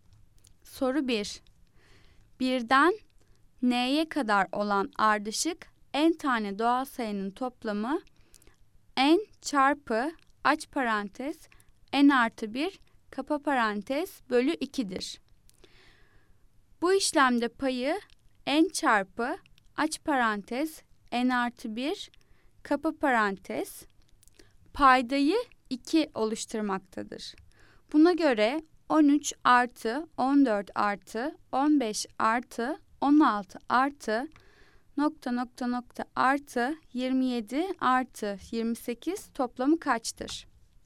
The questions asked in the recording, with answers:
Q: Buna göre 13 artı 14 artı 15 artı 16 artı nokta nokta nokta artı 27 artı 28 toplamı kaçtır?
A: Cevap D 328.